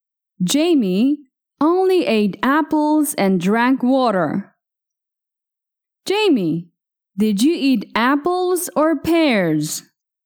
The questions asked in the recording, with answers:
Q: Jamie, did you eat apples or pears?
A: Apples. I ate apples.